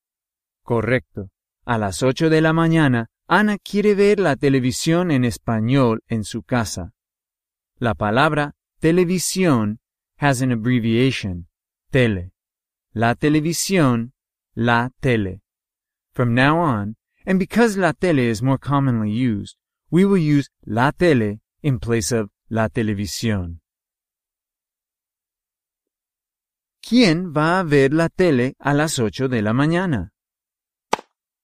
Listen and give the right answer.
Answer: Ana.